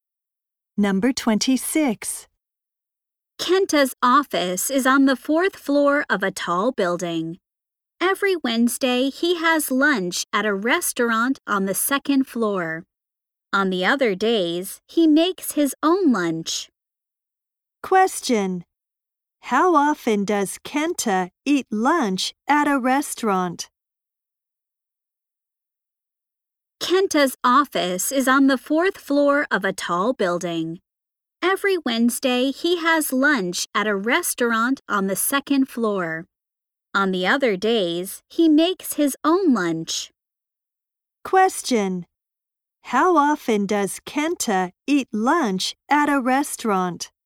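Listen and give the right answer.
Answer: Once a week (every Wednesday).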